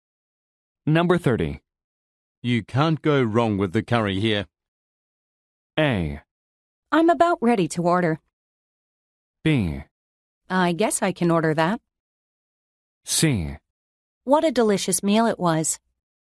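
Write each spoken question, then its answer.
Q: You can't go wrong with the curry here.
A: B: I guess I can order that.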